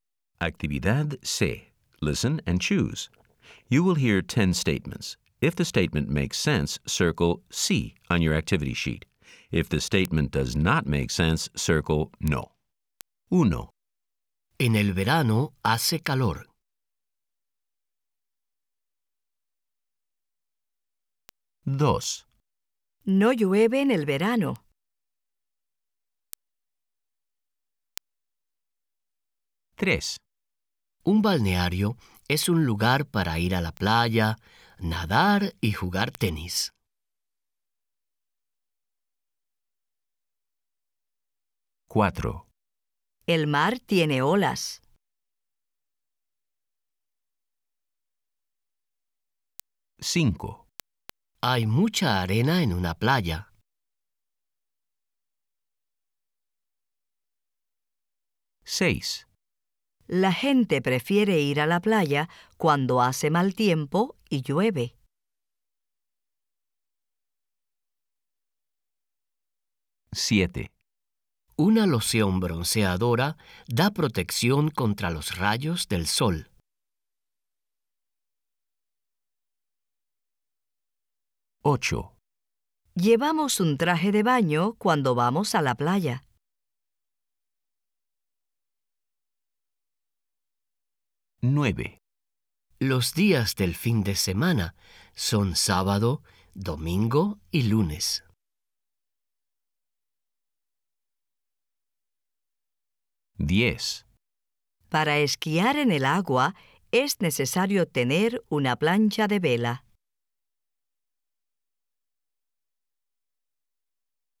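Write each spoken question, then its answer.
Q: En el verano hace calor.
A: Sí

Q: El mar tiene olas.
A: Sí

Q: Hay mucha arena en una playa.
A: Sí

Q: La gente prefiere ir a la playa cuando hace mal tiempo y llueve.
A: No

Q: Una loción bronceadora da protección contra los rayos del sol.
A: Sí

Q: Llevamos un traje de baño cuando vamos a la playa.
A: Sí

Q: Los días del fin de semana son sábado, domingo y lunes.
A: No

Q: Para esquiar en el agua es necesario tener una plancha de vela.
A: No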